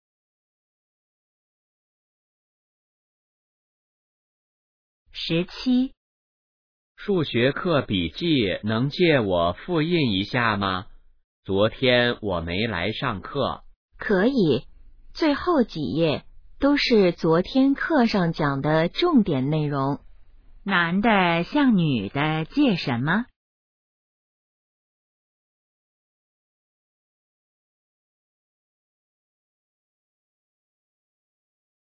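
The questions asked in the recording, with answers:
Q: 男的向女的借什么?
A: 数学课笔记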